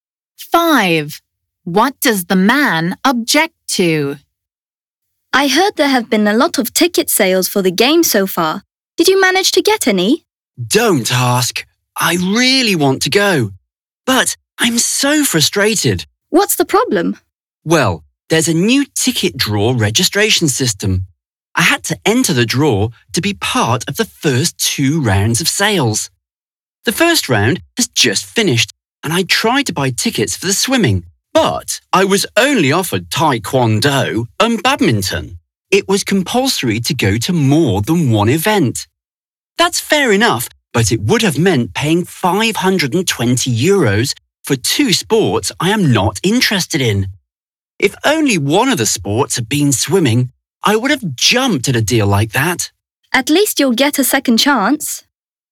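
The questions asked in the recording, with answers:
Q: What does the man object to?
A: Having to pay for tickets to two sports he isn't interested in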